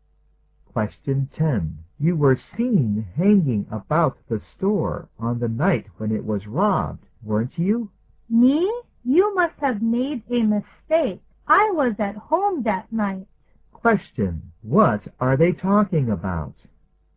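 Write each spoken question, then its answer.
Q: What are they talking about?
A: A store robbery. The man denies being there and says he was at home.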